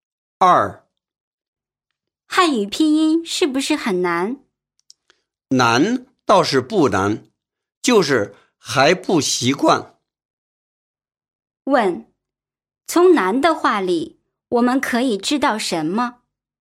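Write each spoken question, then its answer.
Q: 问,从男的话里,我们可以知道什么?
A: 他觉得汉语拼音不难,只是还不习惯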